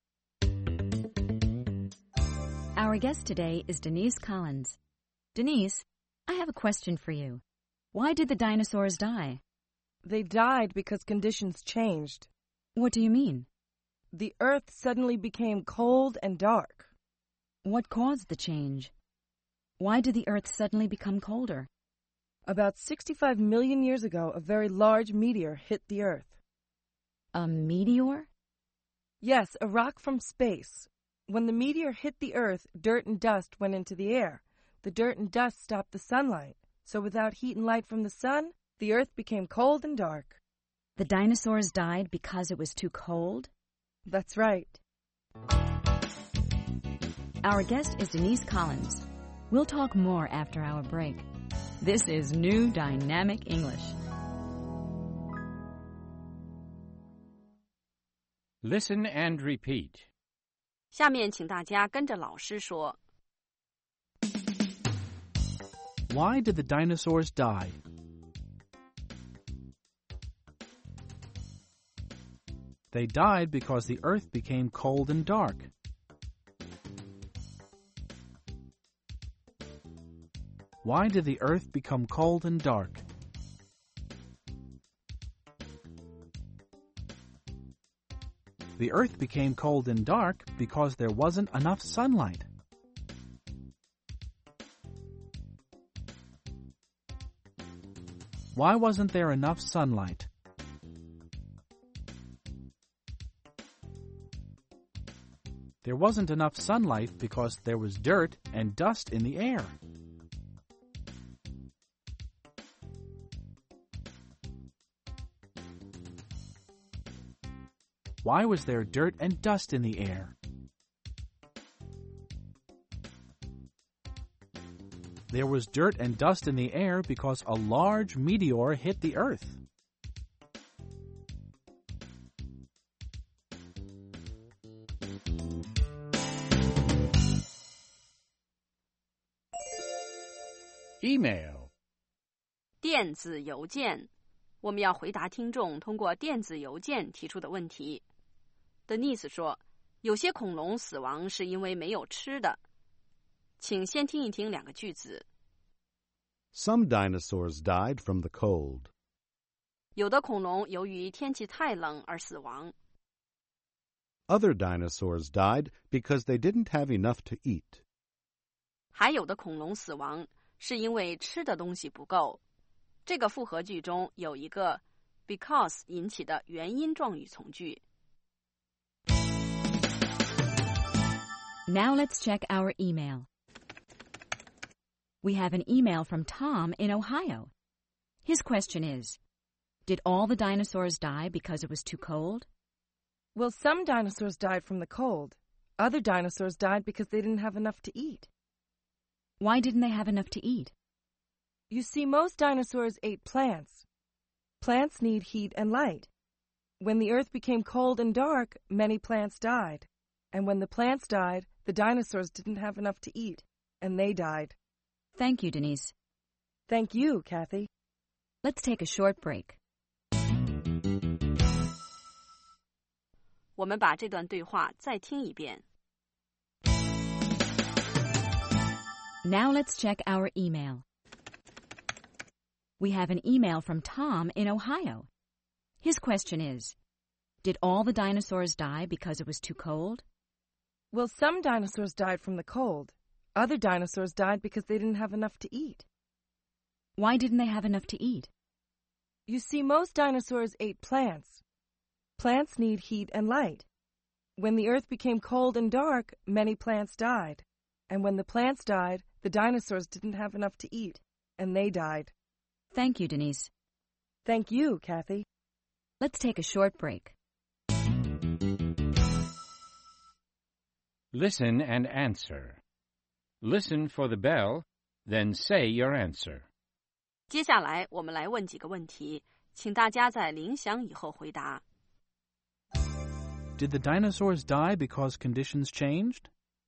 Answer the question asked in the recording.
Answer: Yes, they did. They died because conditions changed.